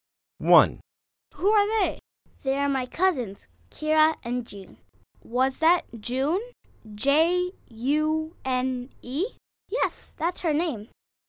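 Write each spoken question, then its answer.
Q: Who are they?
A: Her cousins, Kira and June (J-U-N-E)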